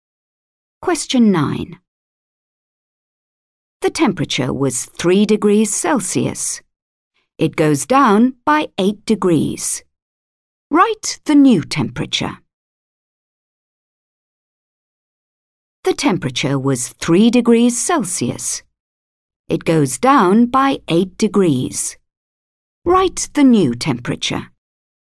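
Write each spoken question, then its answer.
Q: Write the new temperature.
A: -5 degrees Celsius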